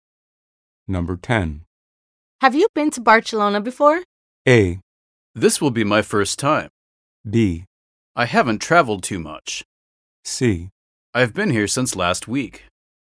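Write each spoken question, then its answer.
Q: Have you been to Barcelona before?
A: A: This will be my first time.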